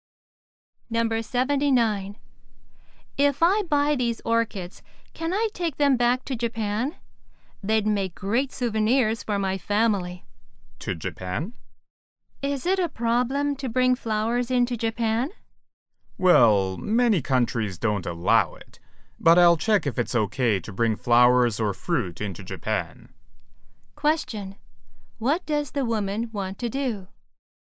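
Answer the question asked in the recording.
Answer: Take orchids back to Japan as souvenirs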